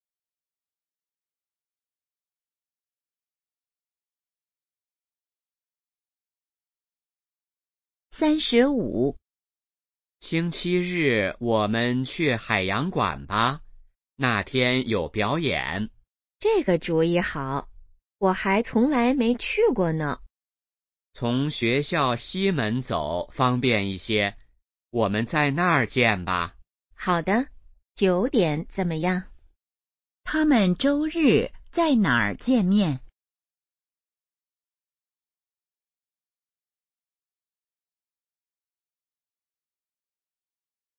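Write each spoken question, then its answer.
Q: 他们周日在哪儿见面?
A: 学校西门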